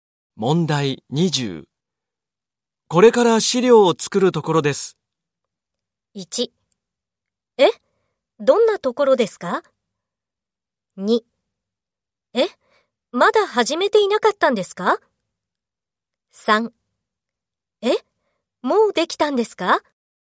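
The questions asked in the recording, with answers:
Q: これから資料を作るところです。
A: 3: え?まだ始めていなかったんですか?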